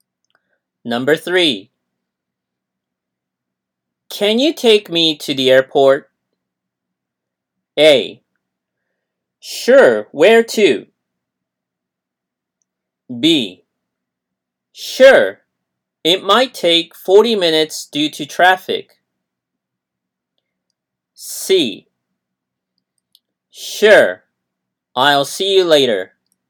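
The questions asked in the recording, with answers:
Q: Can you take me to the airport?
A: B: Sure. It might take 40 minutes due to traffic.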